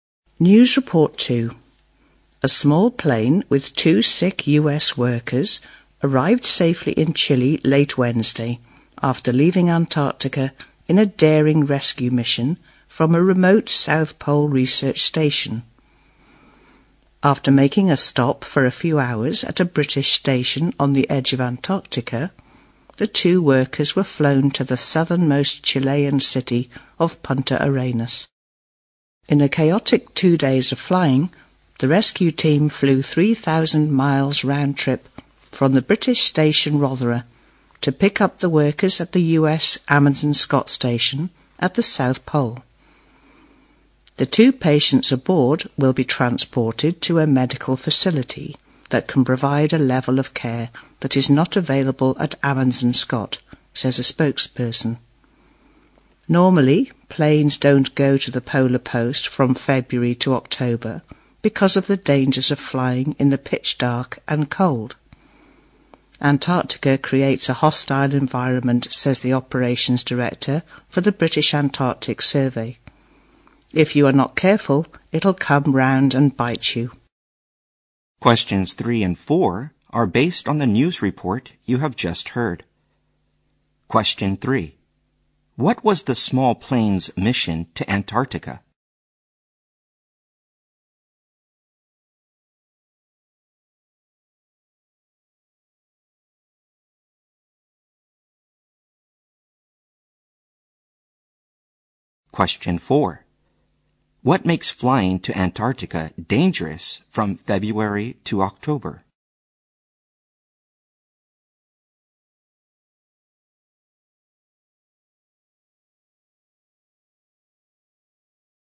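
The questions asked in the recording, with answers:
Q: What was the small plane's mission to Antarctica?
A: To rescue two sick US workers from the South Pole research station

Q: What makes flying to Antarctica dangerous from February to October?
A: The pitch dark and the cold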